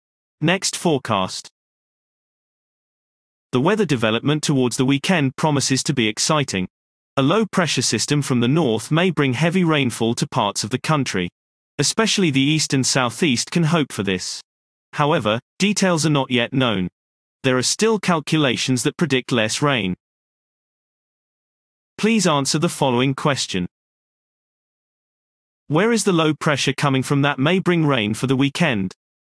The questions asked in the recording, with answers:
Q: Where is the low pressure coming from that may bring rain for the weekend?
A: The low is coming from the north.